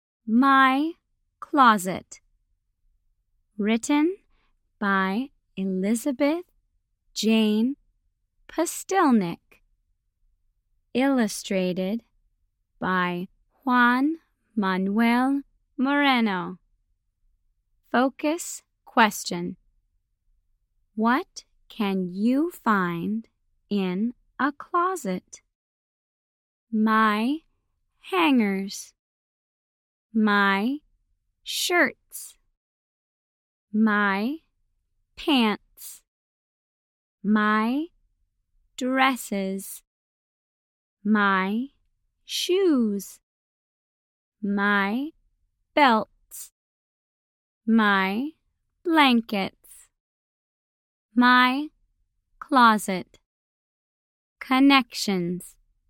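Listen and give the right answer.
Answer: Hangers, shirts, pants, dresses, shoes, belts and blankets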